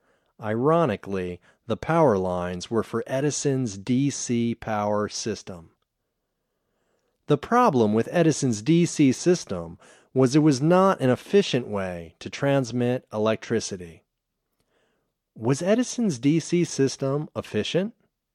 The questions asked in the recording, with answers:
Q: Was Edison's DC system efficient?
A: No, Edison's DC system wasn't efficient.